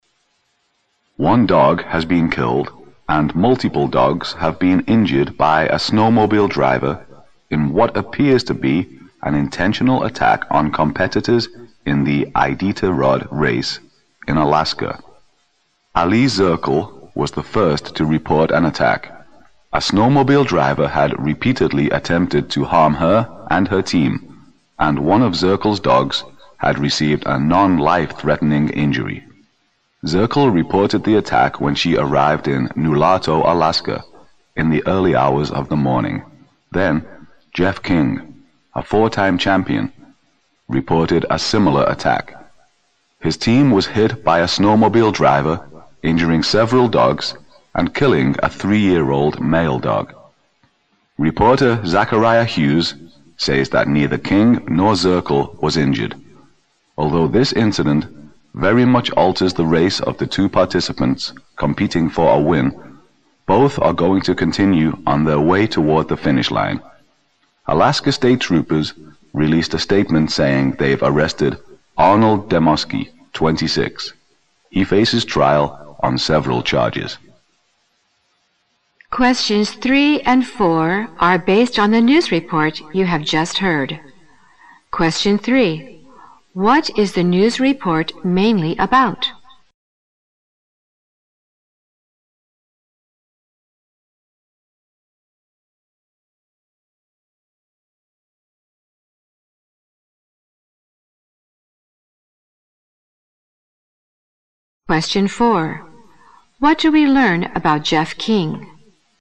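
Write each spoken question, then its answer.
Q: What is the news report mainly about?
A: A snowmobile driver's attack on dog teams in the Iditarod race in Alaska

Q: What do we learn about Jeff King?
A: He is a four-time champion whose team was hit by a snowmobile, injuring several dogs and killing one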